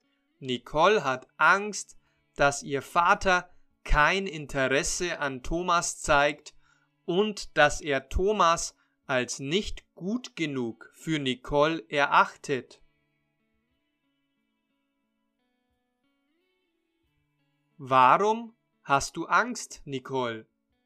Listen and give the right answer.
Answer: Ich habe Angst, dass mein Vater kein Interesse an Thomas zeigt.